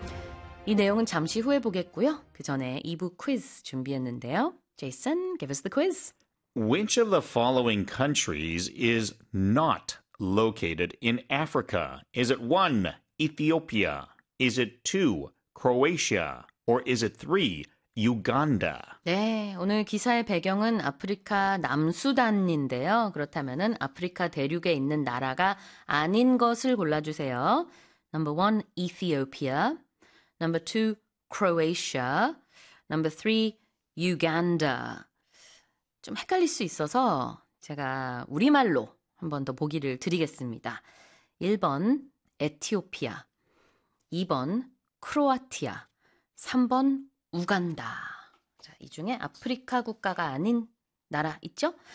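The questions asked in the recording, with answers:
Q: Which of the following countries is not located in Africa?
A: 2: Croatia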